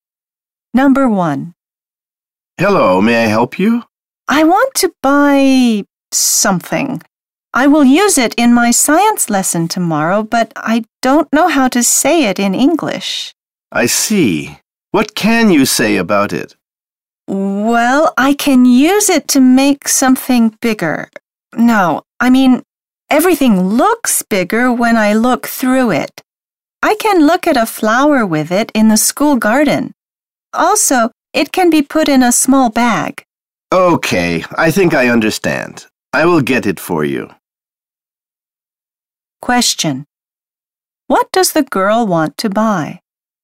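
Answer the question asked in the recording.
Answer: A magnifying glass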